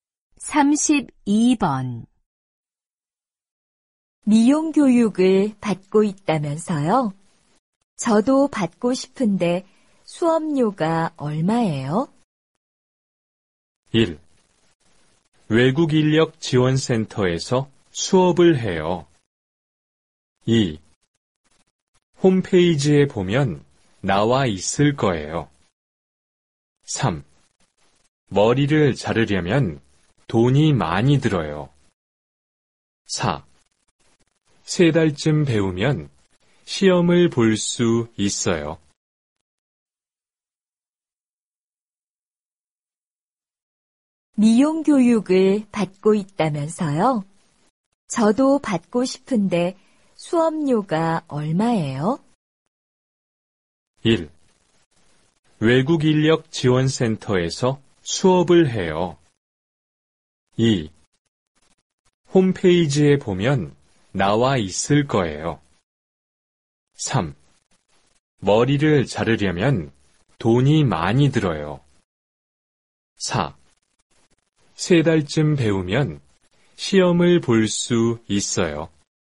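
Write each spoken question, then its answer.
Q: 미용 교육을 받고 있다면서요? 저도 받고 싶은데 수업료가 얼마예요?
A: 2: 홈페이지에 보면 나와 있을 거예요.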